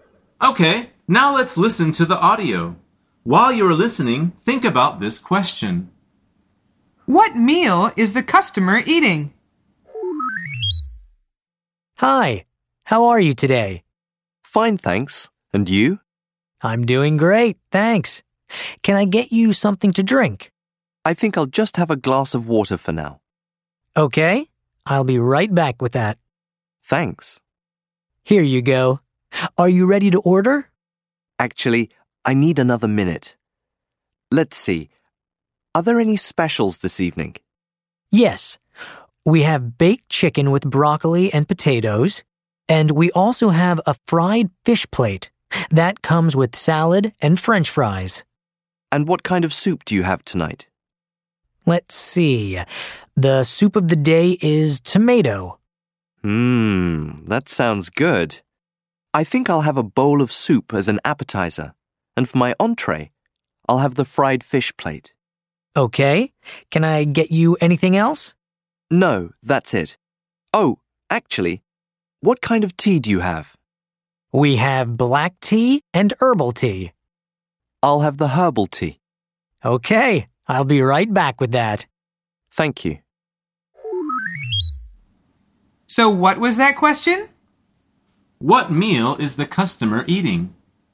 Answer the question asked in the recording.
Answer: The answer is dinner.